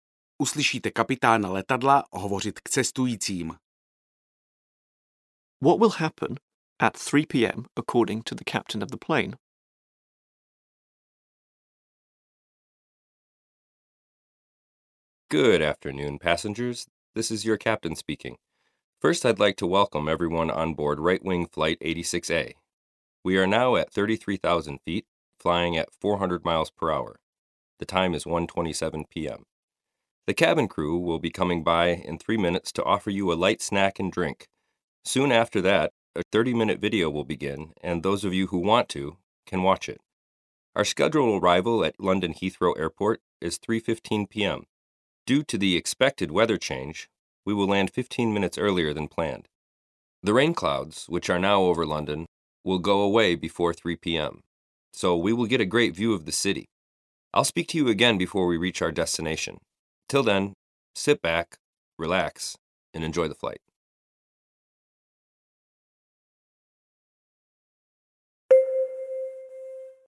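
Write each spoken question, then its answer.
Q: What will happen at 3 p.m. according to the captain of the plane?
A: The plane will land at London Heathrow (15 minutes earlier than the scheduled 3:15).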